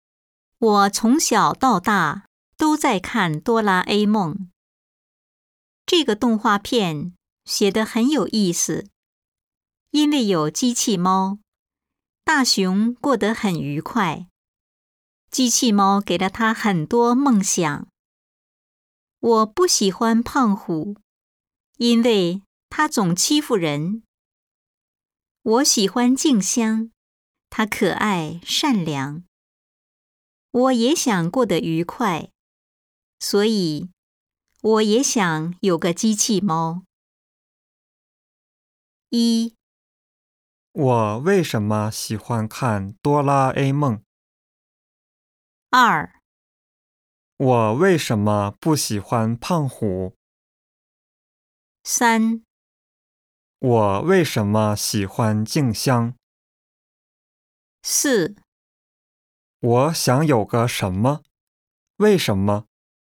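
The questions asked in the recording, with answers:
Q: 我为什么喜欢看哆啦 A 梦?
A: 因为这个动画片写得很有意思

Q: 我为什么不喜欢胖虎?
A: 因为他总欺负人

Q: 我为什么喜欢静香?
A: 因为她可爱善良

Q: 我想有个什么?为什么?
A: 想有个机器猫,因为也想过得愉快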